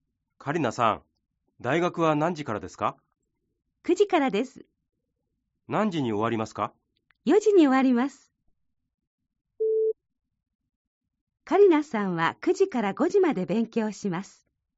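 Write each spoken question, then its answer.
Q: カリナさんは9時から5時まで勉強します。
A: ×(4時に終わります)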